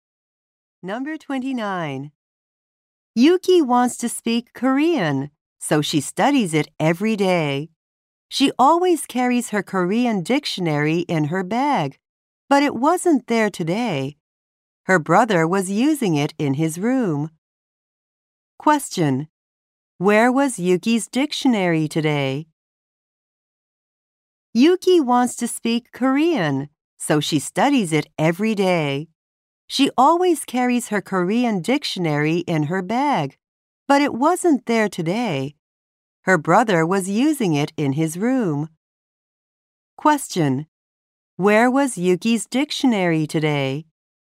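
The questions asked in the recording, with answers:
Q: Where was Yuki's dictionary today?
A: In her brother's room.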